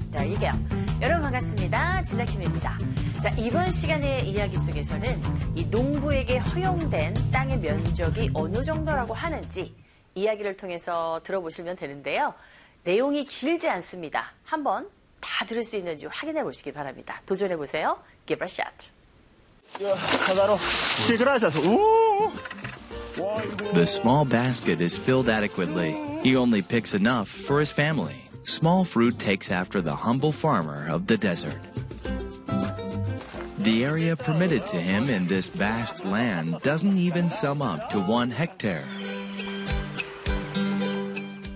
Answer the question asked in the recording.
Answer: 네, 1헥타르조차도 되지 않는다.